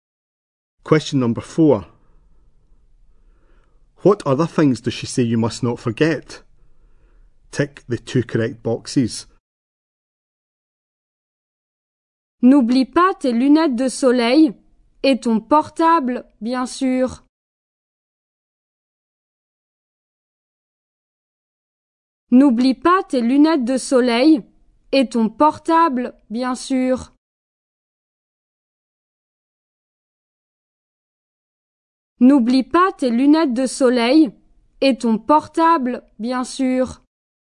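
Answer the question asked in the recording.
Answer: Sunglasses and mobile phone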